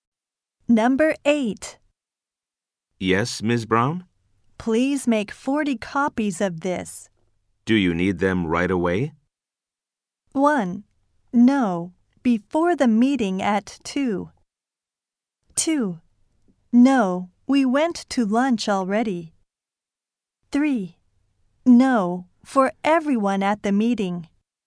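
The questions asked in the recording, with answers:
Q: Do you need them right away?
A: 1: No, before the meeting at 2.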